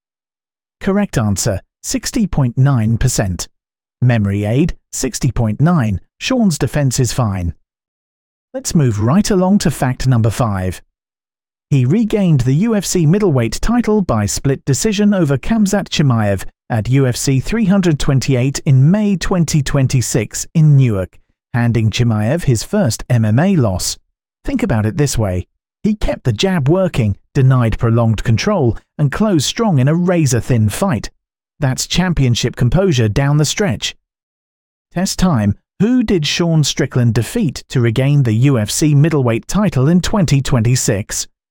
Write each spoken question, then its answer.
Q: Who did Sean Strickland defeat to regain the UFC middleweight title in 2026?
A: Correct answer, Khamzat Chimaev.